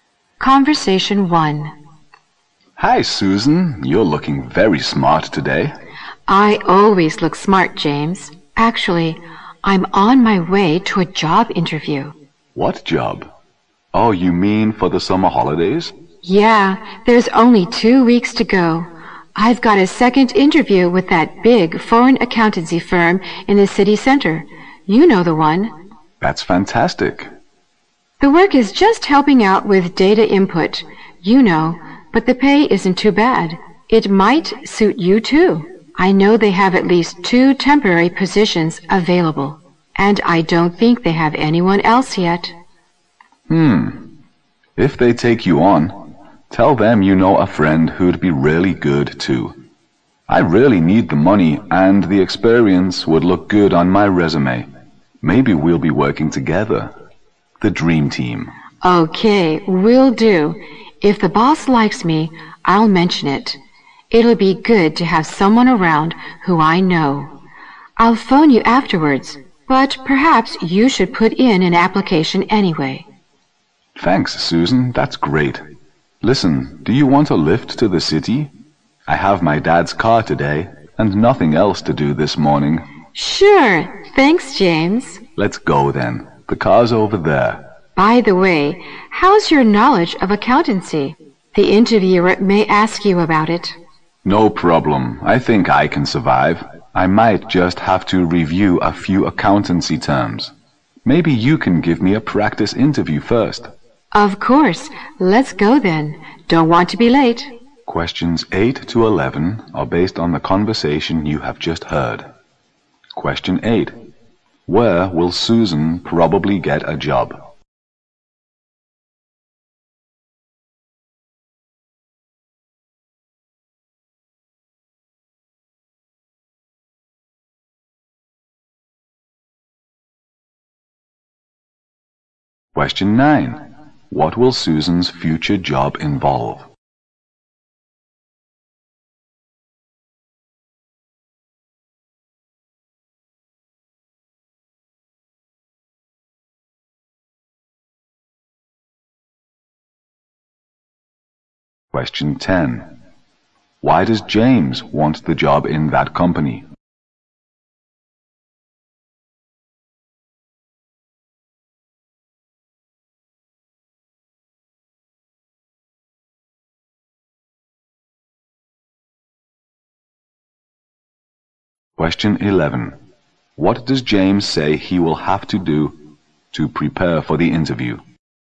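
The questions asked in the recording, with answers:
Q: Where will Susan probably get a job?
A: At a big foreign accountancy firm in the city center

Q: What will Susan's future job involve?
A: Helping out with data input

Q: Why does James want the job in that company?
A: He needs the money and the experience would look good on his resume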